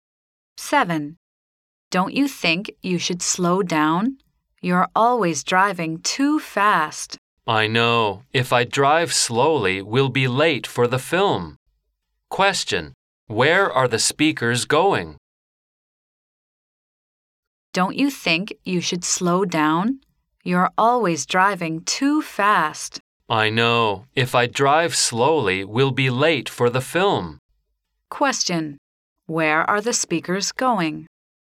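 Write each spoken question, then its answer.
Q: Where are the speakers going?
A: To the cinema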